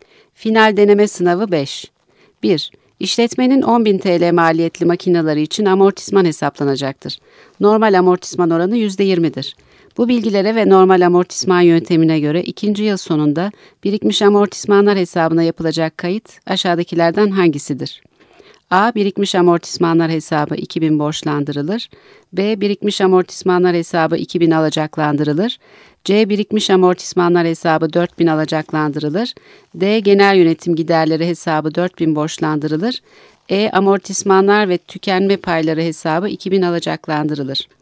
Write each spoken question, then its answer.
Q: Bu bilgilere ve normal amortisman yöntemine göre ikinci yıl sonunda birikmiş amortismanlar hesabına yapılacak kayıt aşağıdakilerden hangisidir?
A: Yanıt B.